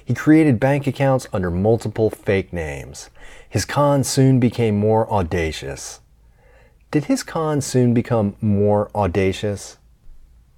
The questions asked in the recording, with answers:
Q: Did his cons soon become more audacious?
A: Yes, his cons soon became more audacious.